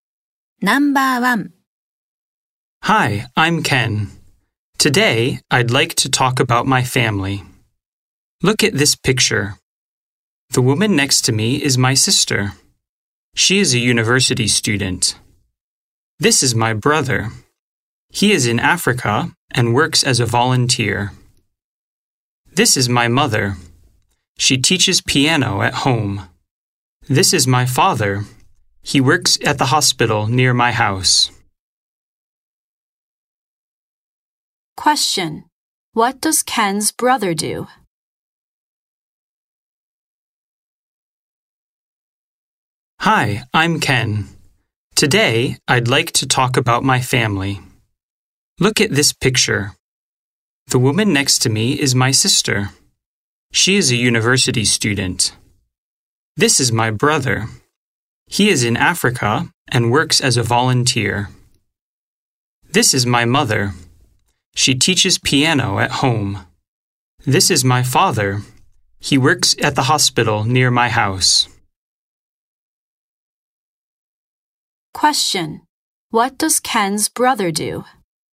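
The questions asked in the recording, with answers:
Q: What does Ken's brother do?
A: He works as a volunteer in Africa.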